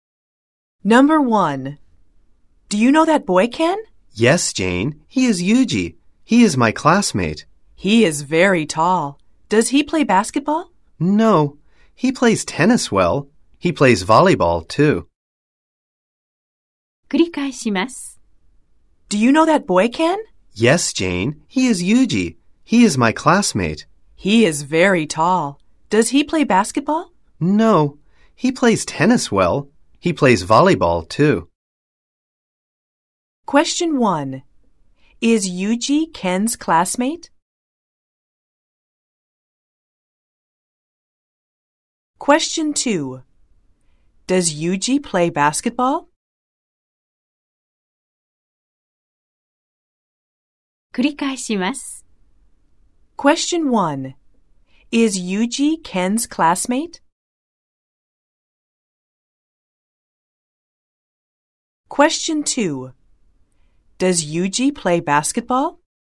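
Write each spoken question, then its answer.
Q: Is Yuji Ken's classmate?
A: Yes, he is.

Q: Does Yuji play basketball?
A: No, he doesn't.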